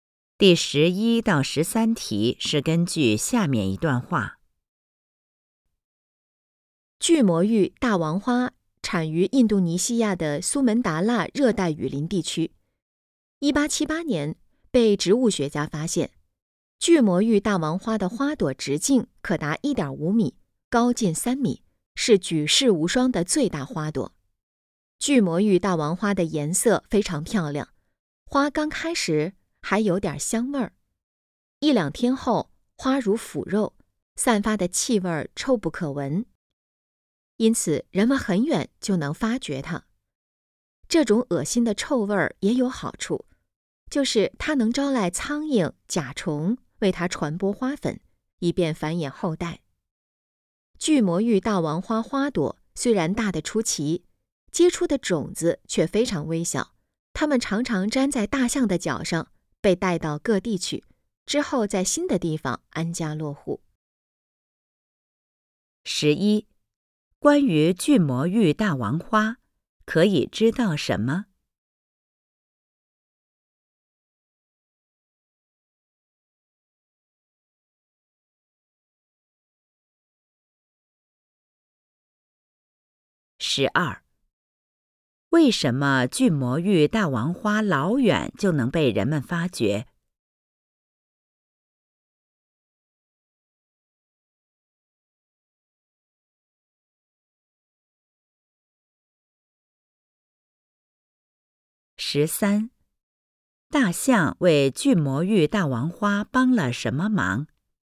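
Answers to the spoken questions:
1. 它散发的气味臭不可闻
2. 把粘在脚上的种子带到各地去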